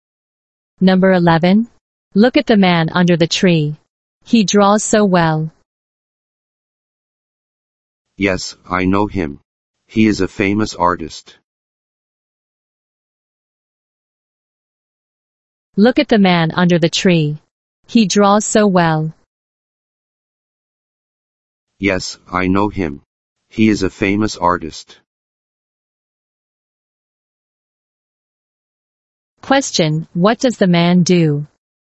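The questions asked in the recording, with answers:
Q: Question, what does the man do?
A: He is an artist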